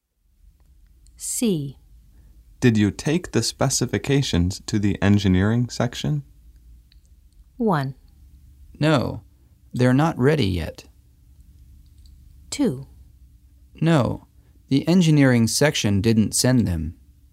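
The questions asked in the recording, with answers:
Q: Did you take the specifications to the engineering section?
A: 1: No, they're not ready yet.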